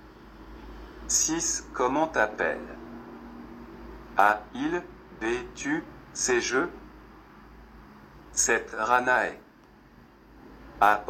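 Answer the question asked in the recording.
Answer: B: Tu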